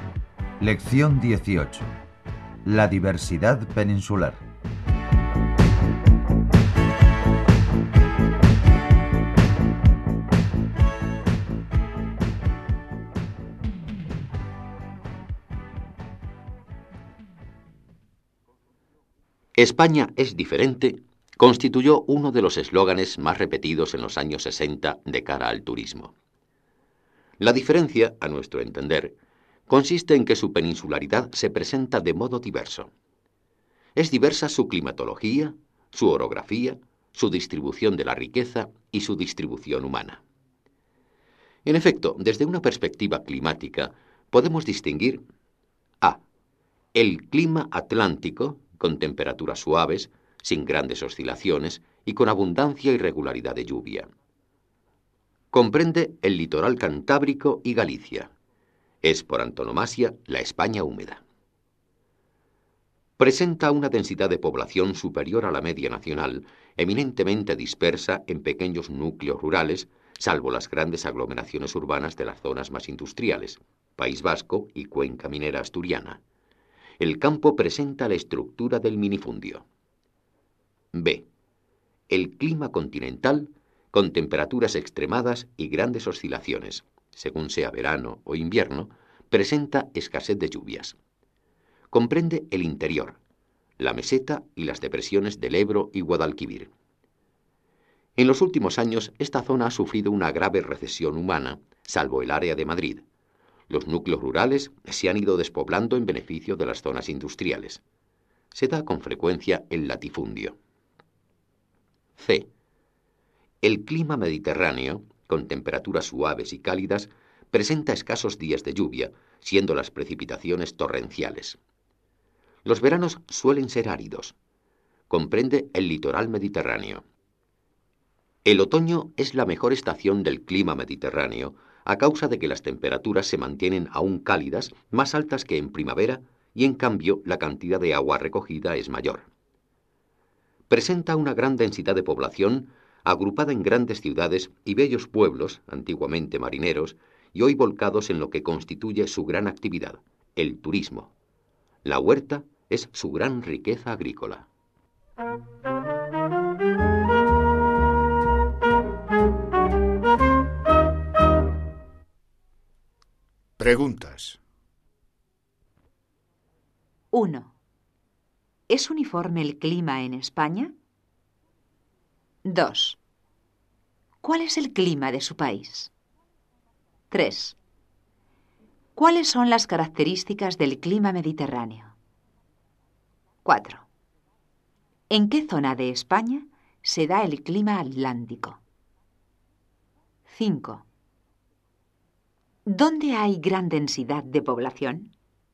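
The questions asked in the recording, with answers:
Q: ¿Es uniforme el clima en España?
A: No, es diverso: atlántico, continental y mediterráneo

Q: ¿Cuáles son las características del clima mediterráneo?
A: Temperaturas suaves y cálidas, escasos días de lluvia con precipitaciones torrenciales y veranos áridos

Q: ¿En qué zona de España se da el clima atlántico?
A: En el litoral cantábrico y Galicia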